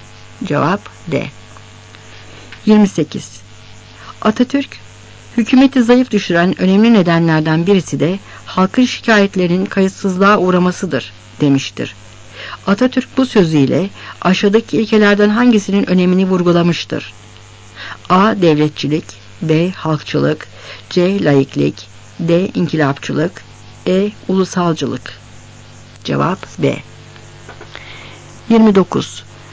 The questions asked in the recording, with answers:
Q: Atatürk bu sözüyle aşağıdaki ilkelerden hangisinin önemini vurgulamıştır?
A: Cevap B.